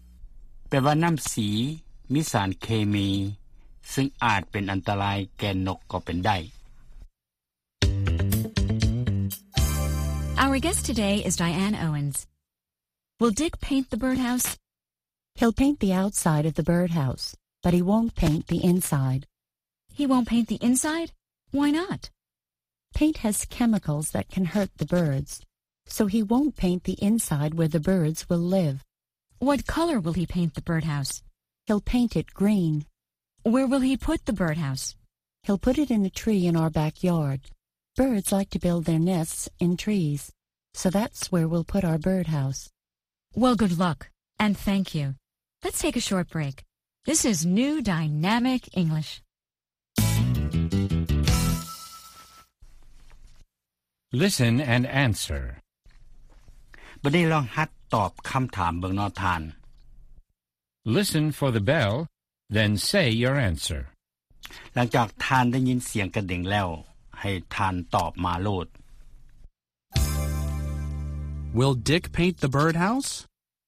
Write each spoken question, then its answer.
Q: Will Dick paint the birdhouse?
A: He'll paint the outside, but he won't paint the inside.